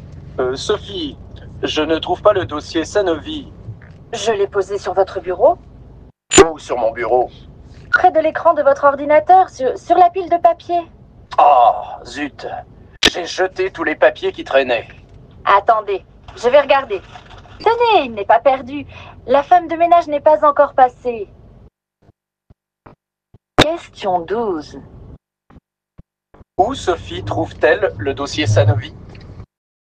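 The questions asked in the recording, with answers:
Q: Où Sophie trouve-t-elle le dossier Sanovi ?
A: Dans la corbeille à papier (la poubelle)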